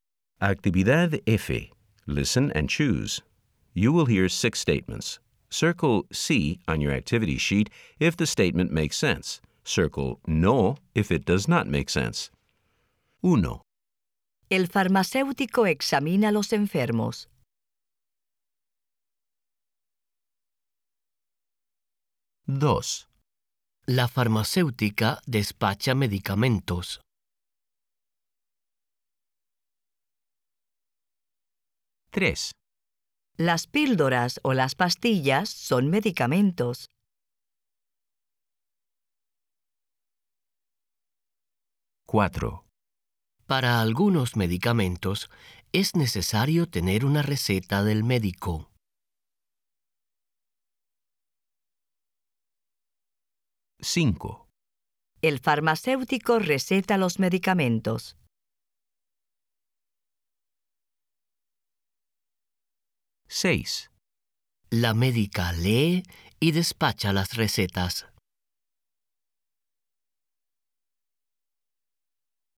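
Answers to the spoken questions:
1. No
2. Sí
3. Sí
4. Sí
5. No
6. No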